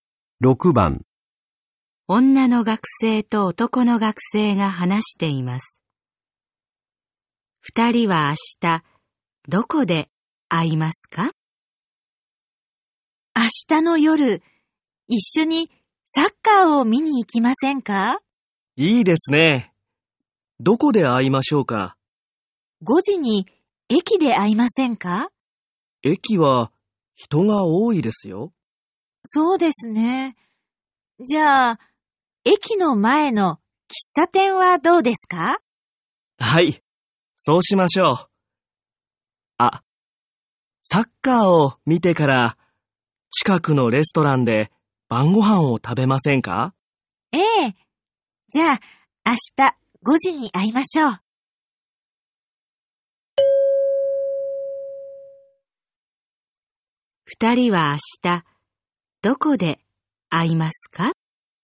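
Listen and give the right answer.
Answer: 駅の前の喫茶店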